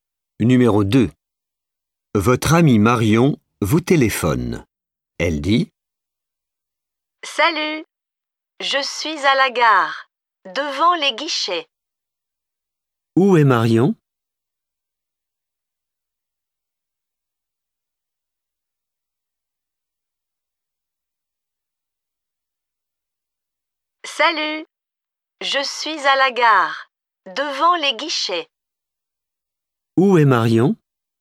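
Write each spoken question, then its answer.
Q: Où est Marion ?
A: À la gare, devant les guichets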